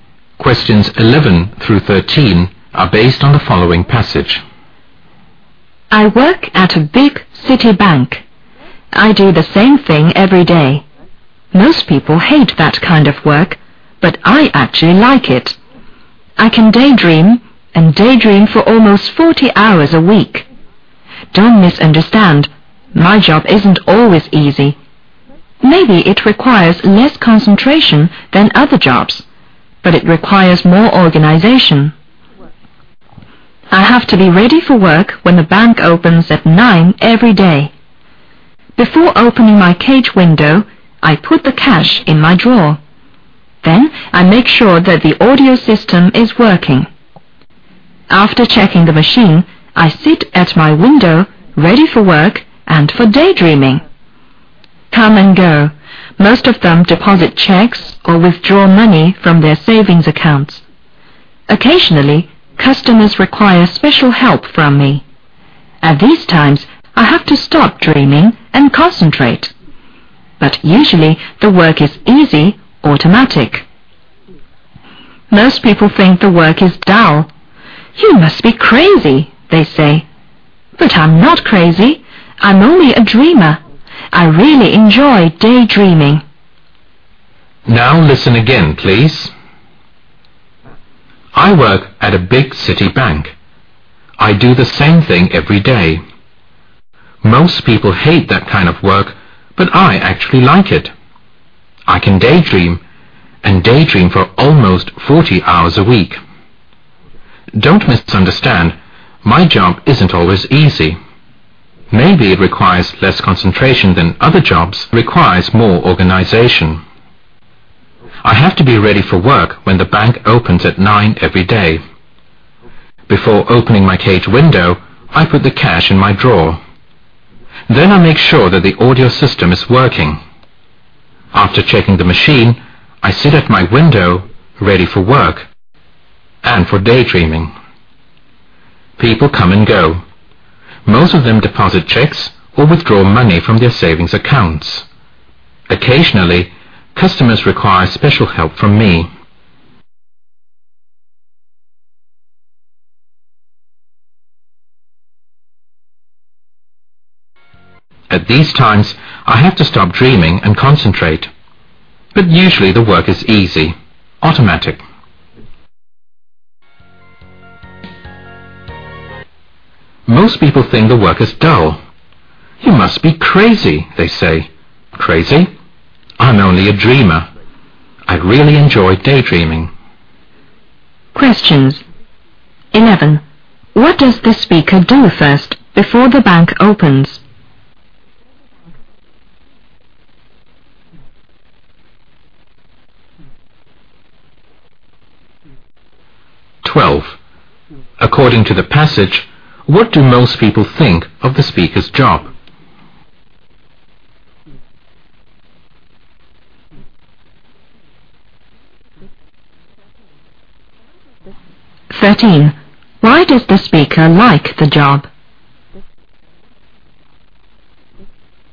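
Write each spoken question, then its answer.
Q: What does the speaker do first before the bank opens?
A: Puts the cash in the drawer

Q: According to the passage, what do most people think of the speaker's job?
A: It is dull

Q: Why does the speaker like the job?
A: He can daydream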